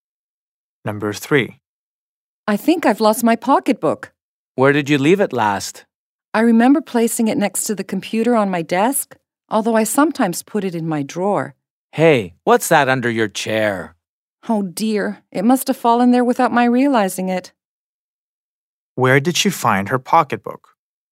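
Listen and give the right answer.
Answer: Under her chair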